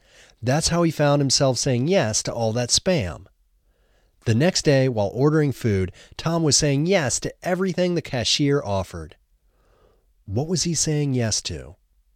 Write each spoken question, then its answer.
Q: What was he saying yes to?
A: He was saying yes to everything the cashier offered.